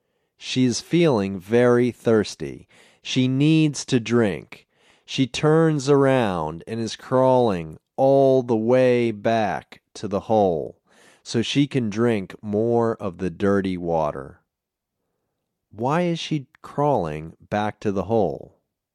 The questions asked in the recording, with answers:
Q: Why is she crawling back to the hole?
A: She is crawling back to the hole so she can drink more of the dirty water.